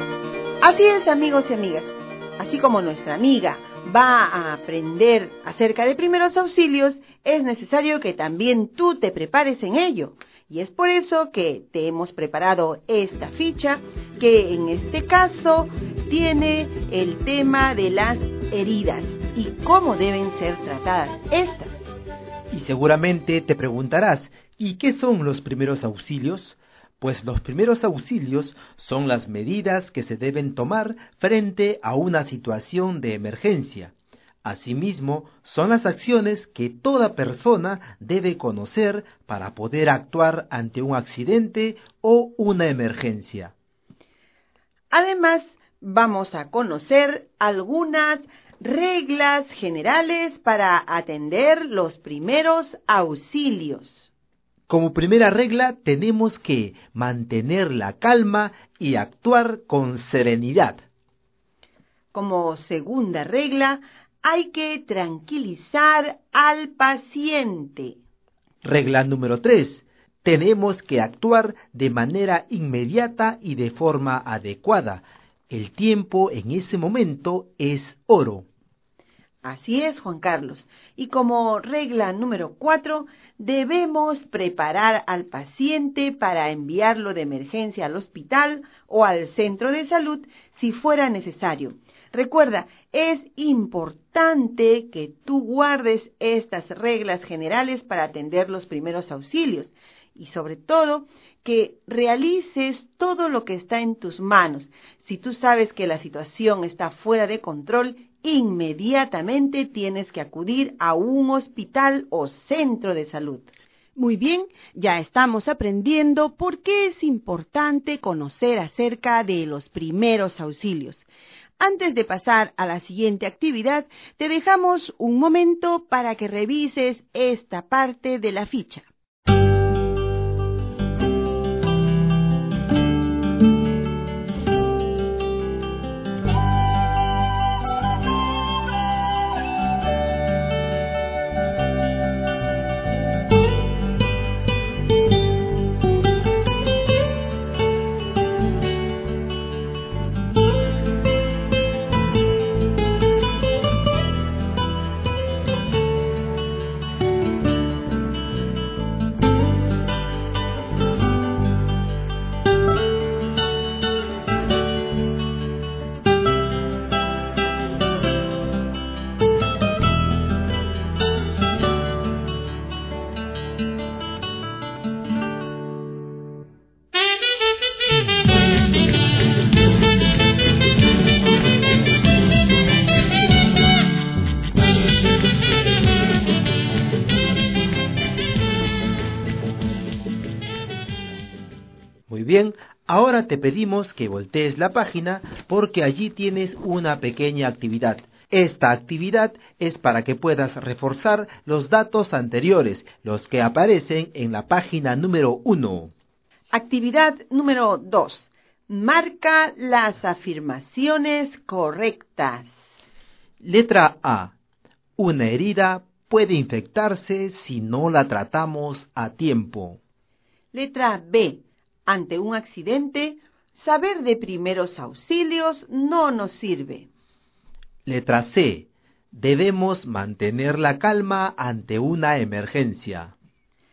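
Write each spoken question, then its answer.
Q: Actividad número 2. Marca las afirmaciones correctas.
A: A: Una herida puede infectarse si no la tratamos a tiempo; C: Debemos mantener la calma ante una emergencia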